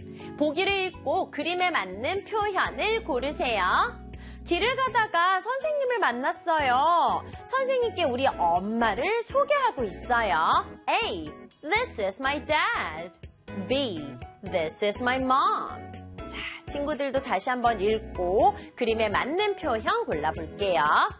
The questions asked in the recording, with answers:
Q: 보기를 읽고 그림에 맞는 표현을 고르세요.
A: 정답은 B.